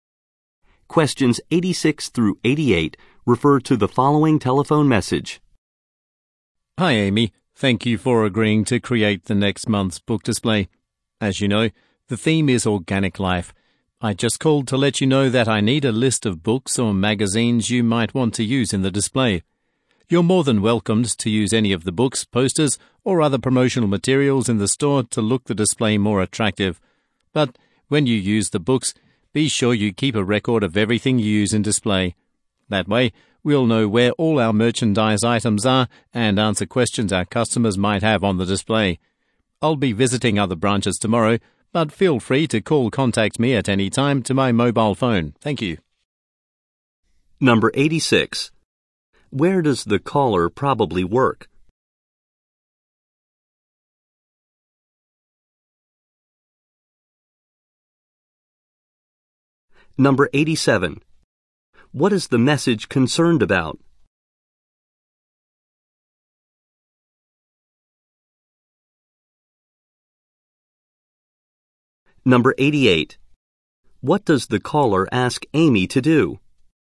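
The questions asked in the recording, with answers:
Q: Where does the caller probably work?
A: At a bookstore

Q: What is the message concerned about?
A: A book display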